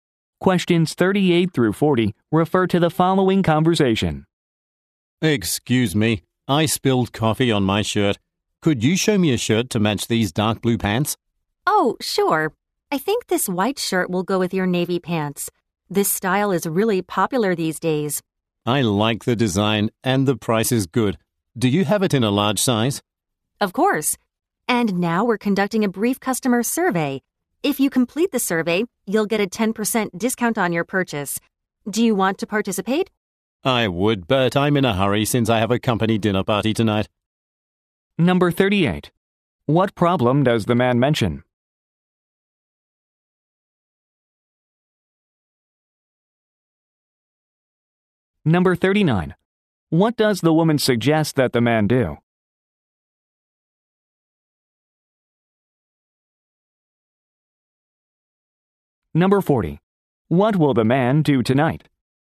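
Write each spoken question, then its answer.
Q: What problem does the man mention?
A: He spilled coffee on his shirt

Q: What does the woman suggest that the man do?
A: Complete a customer survey

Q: What will the man do tonight?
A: Attend a company dinner party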